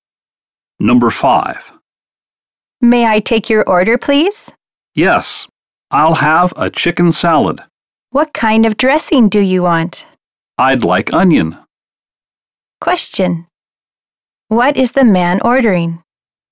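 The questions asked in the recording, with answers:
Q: What is the man ordering?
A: A chicken salad with onion dressing.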